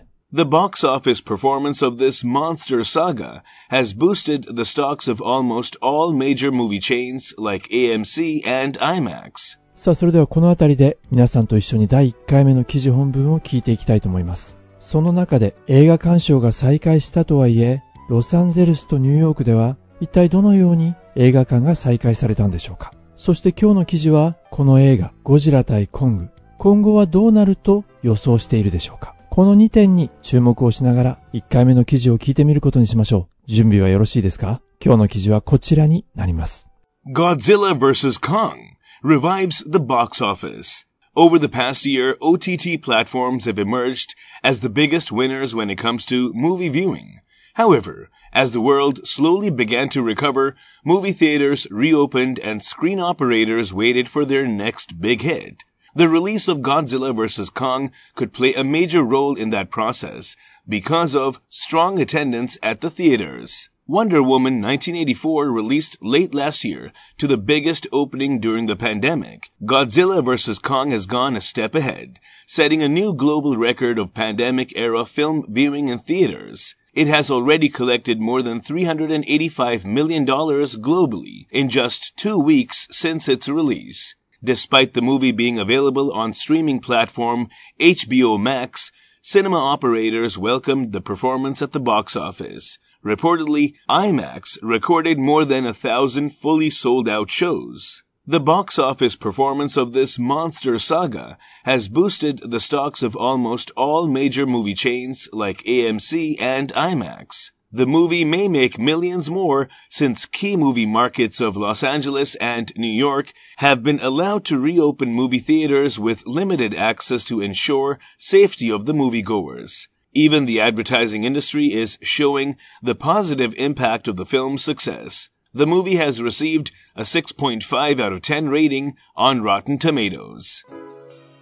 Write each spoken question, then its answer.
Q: ロサンゼルスとニューヨークでは一体どのように映画館が再開されたんでしょうか。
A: limited access、 入場制限をして ensure safety、 安全を確保する。

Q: そして今日の記事は、この映画ゴジラ対コング、今後はどうなると予想しているでしょうか。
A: もしかしたらこの映画さらに数百万ドルの収益を上げる可能性がある。